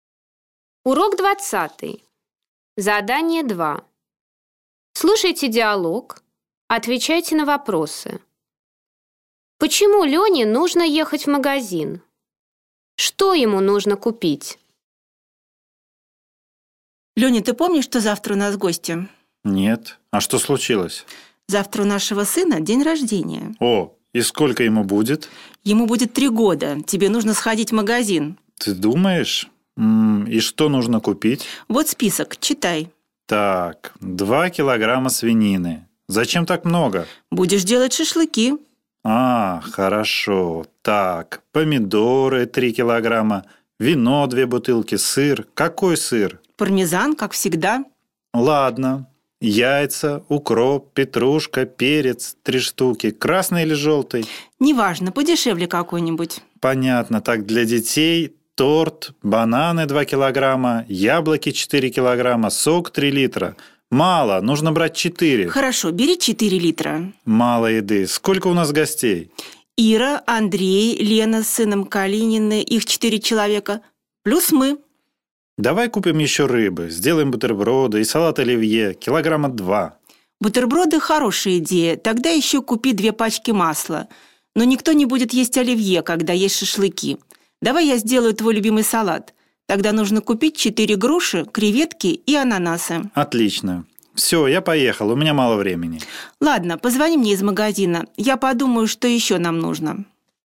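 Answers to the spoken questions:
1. Завтра у сына день рождения, придут гости
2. Свинину, помидоры, вино, сыр, яйца, укроп, петрушку, перец, торт, бананы, яблоки, сок, рыбу, масло, груши, креветки, ананасы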